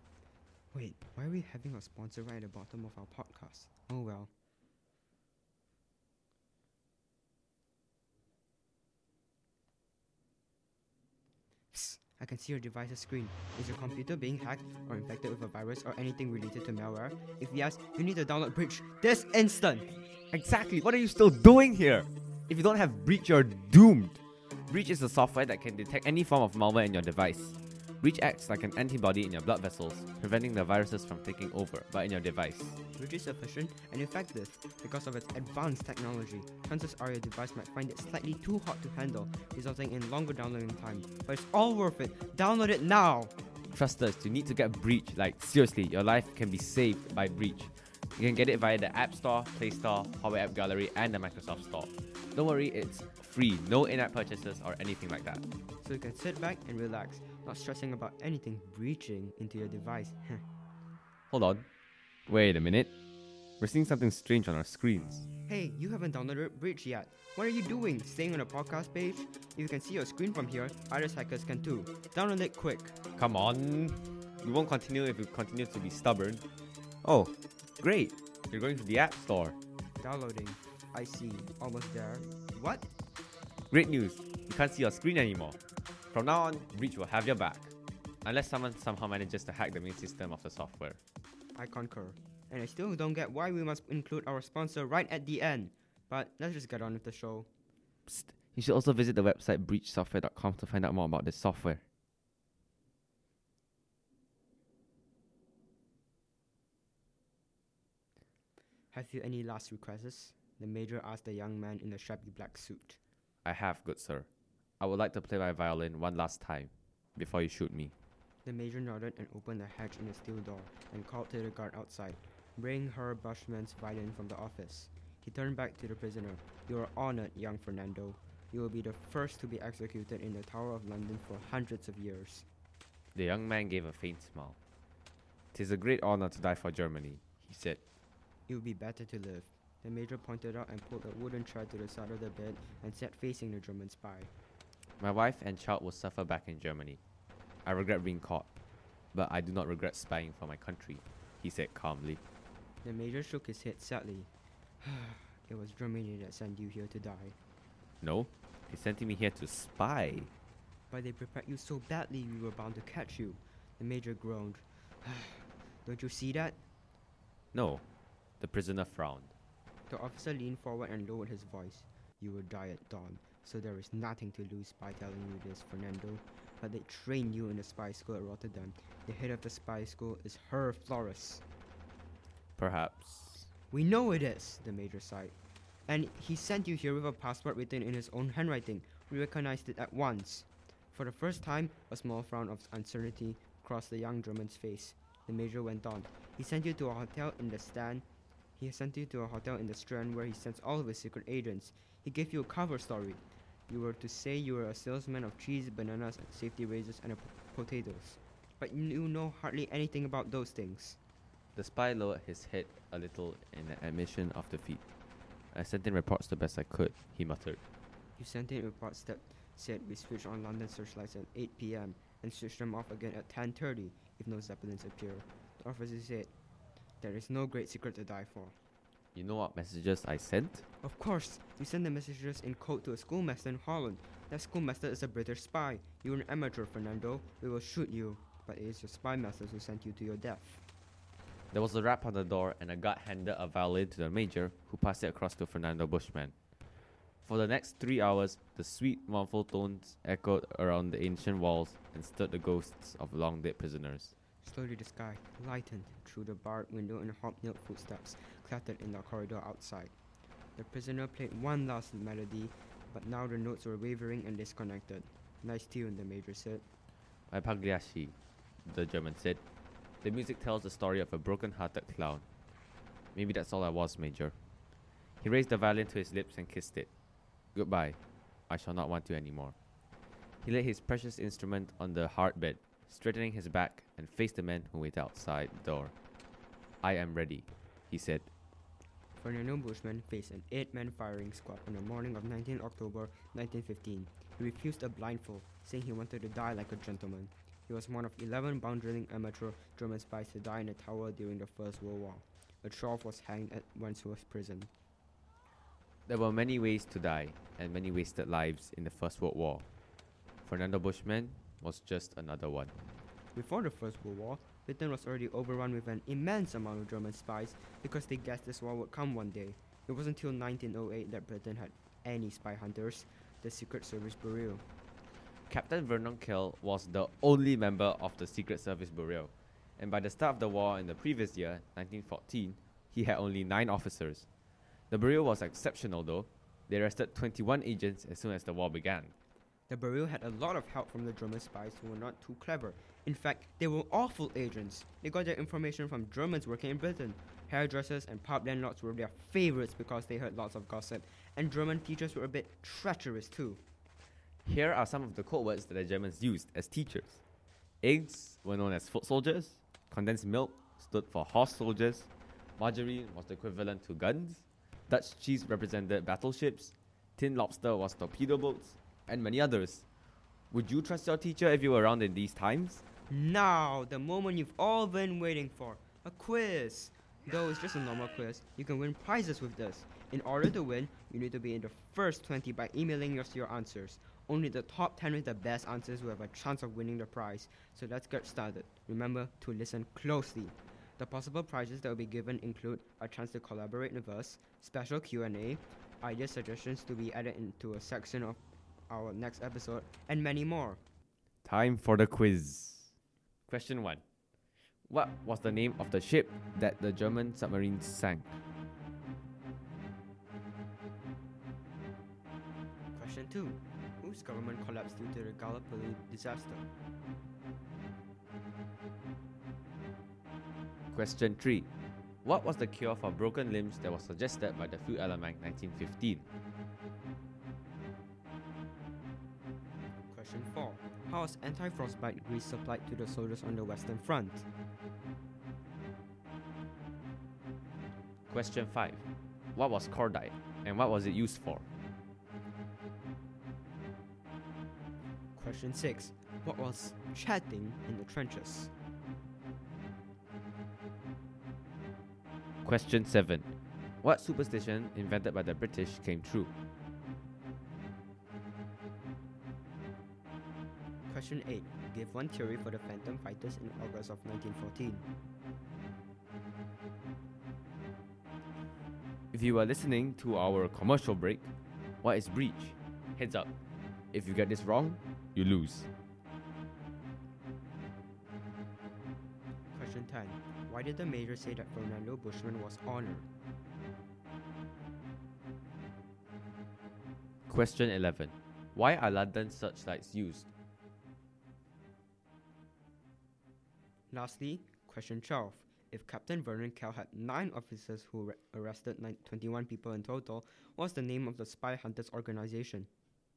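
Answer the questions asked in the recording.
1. A software that detects any form of malware in your device
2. He would be the first to be executed in the Tower of London for hundreds of years
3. To spot zeppelins
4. The Secret Service Bureau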